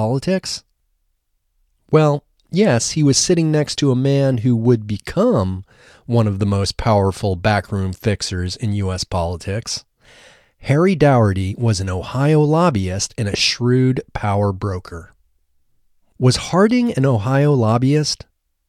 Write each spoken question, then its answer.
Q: Was Harding an Ohio lobbyist?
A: No, Harding wasn't an Ohio lobbyist.